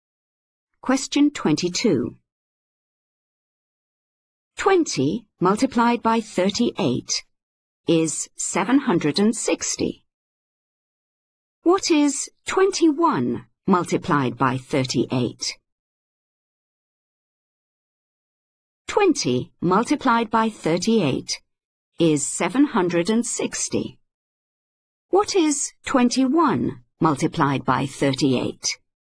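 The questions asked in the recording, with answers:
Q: What is 21 multiplied by 38?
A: 798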